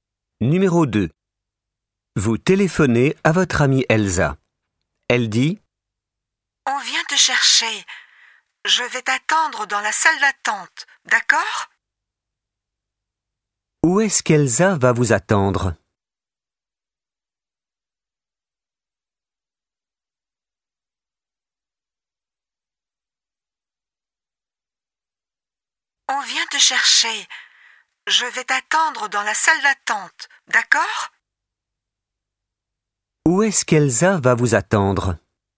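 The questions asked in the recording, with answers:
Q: Où est-ce qu'Elsa va vous attendre ?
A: Dans la salle d'attente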